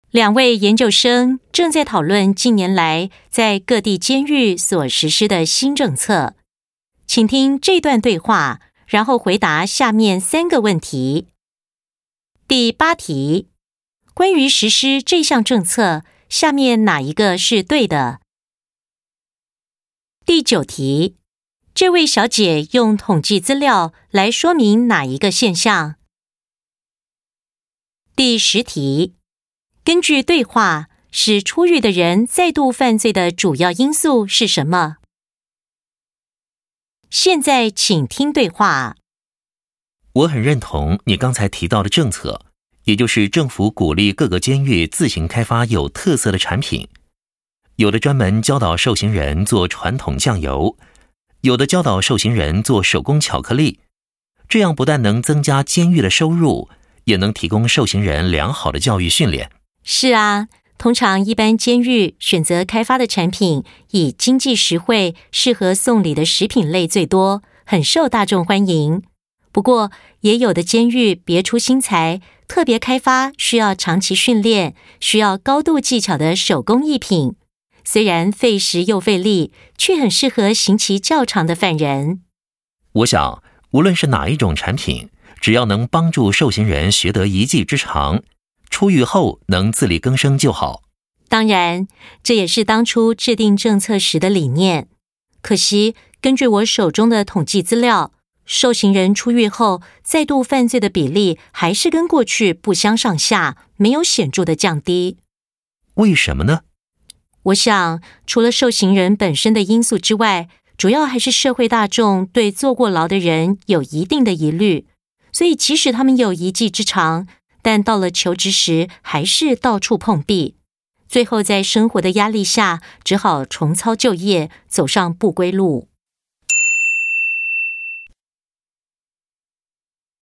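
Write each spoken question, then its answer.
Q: 这位小姐用统计资料来说明哪一个现象?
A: 受刑人出狱后再度犯罪的比例跟过去不相上下,没有显著降低

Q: 根据对话,使出狱的人再度犯罪的主要因素是什么?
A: 社会大众对坐过牢的人有疑虑,他们求职时到处碰壁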